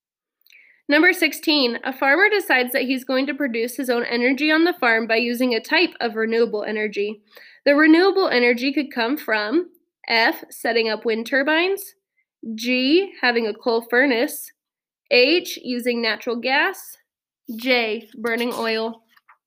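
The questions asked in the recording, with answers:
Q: The renewable energy could come from F, setting up wind turbines, G, having a coal furnace, H, using natural gas, J, burning oil.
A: F: setting up wind turbines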